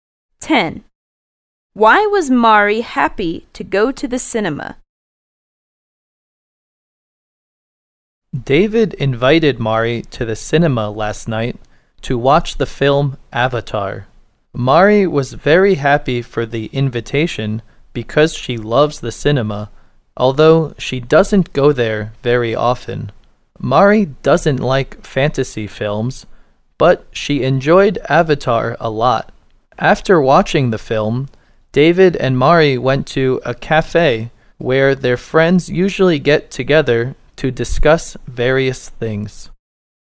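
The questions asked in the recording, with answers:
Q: Why was Mari happy to go to the cinema?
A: Because she loves the cinema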